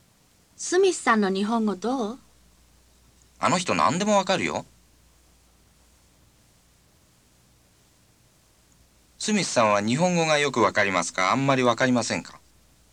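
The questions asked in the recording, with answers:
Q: スミスさんは日本語がよくわかりますか、あんまりわかりませんか?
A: よくわかります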